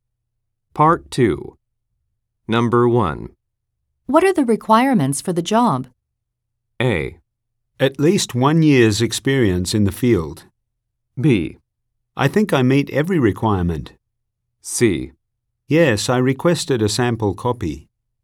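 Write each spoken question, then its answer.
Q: What are the requirements for the job?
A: A: At least 1 year's experience in the field.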